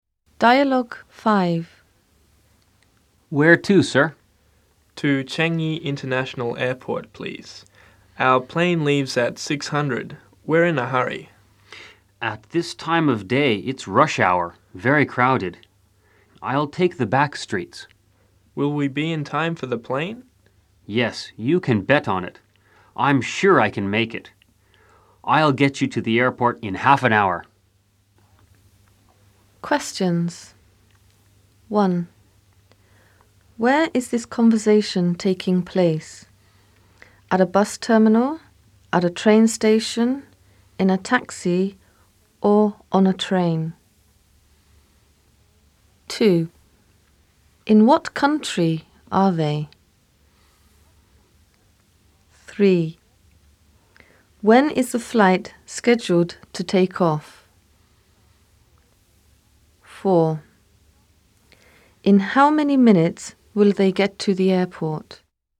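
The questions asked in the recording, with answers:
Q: Where is this conversation taking place?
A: in a taxi

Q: In what country are they?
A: Singapore

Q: When is the flight scheduled to take off?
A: At 6:00

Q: In how many minutes will they get to the airport?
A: 30 minutes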